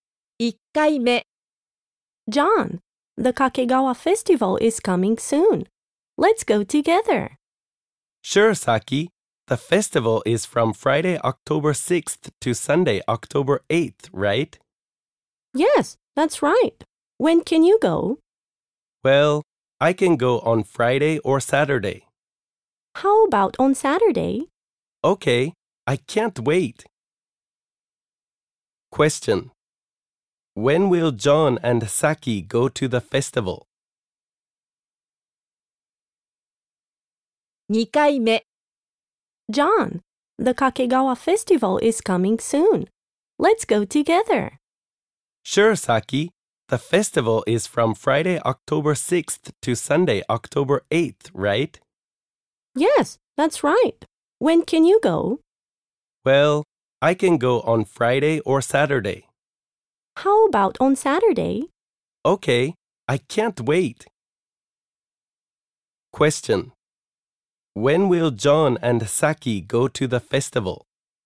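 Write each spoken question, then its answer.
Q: When will John and Saki go to the festival?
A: On Saturday, October 7th.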